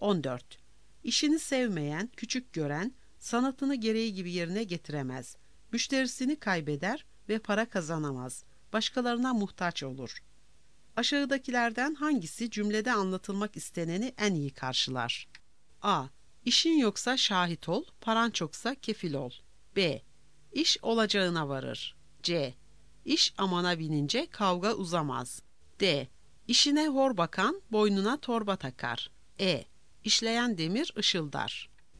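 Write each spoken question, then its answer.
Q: Aşağıdakilerden hangisi cümlede anlatılmak isteneni en iyi karşılar?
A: D: İşine hor bakan boynuna torba takar.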